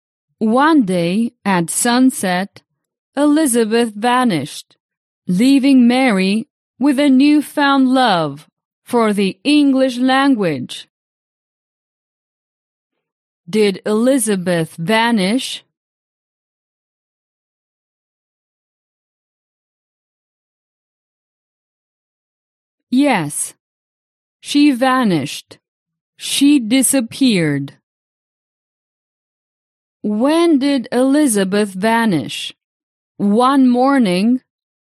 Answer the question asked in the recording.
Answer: No, no. She didn't vanish one morning.